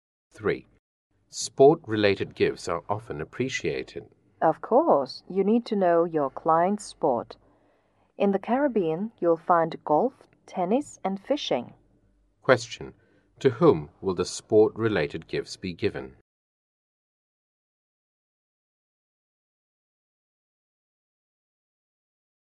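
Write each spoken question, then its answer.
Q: To whom will the sport-related gifts be given?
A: To clients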